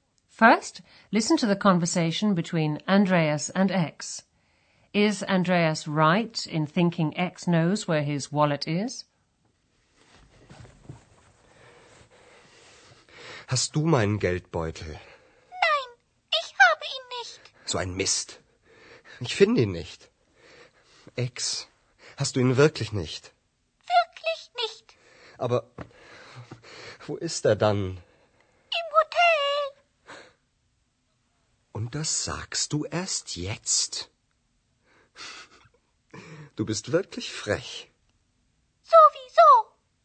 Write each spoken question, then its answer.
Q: Is Andreas right in thinking X knows where his wallet is?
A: X hasn't got Andreas's wallet, but she knows where it is.